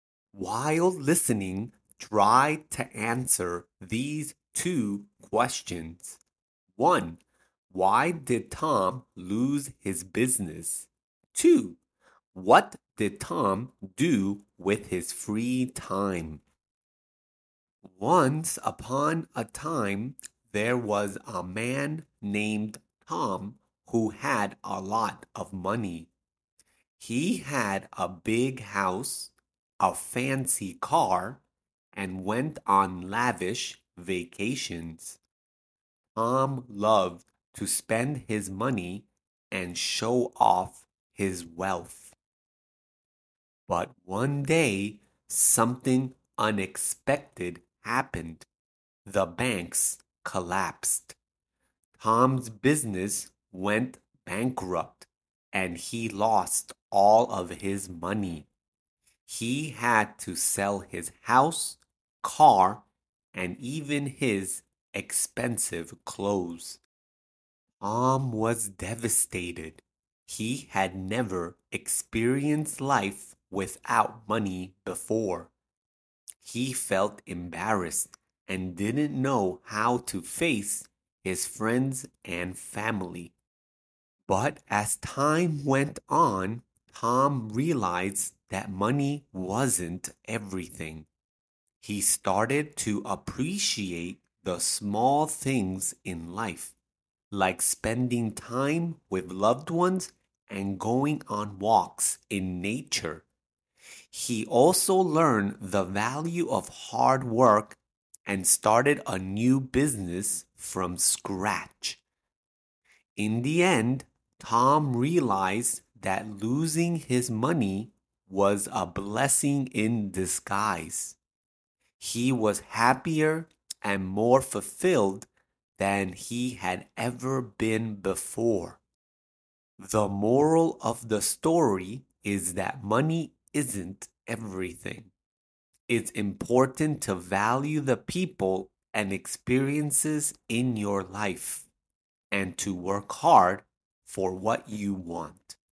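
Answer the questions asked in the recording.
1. The banks collapsed and his business went bankrupt.
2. He spent time with loved ones and went on walks in nature.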